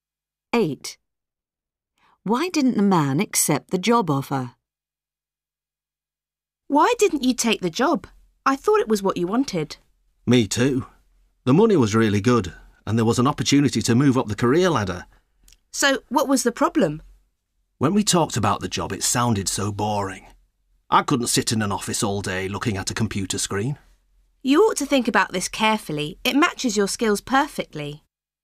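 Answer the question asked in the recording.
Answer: the job sounded boring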